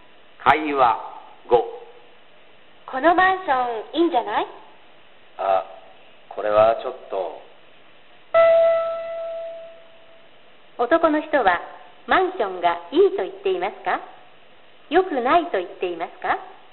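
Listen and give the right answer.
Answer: よくないと言っています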